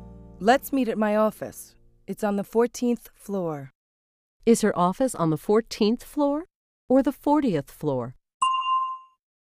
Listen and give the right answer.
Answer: It's on the 14th floor. 14.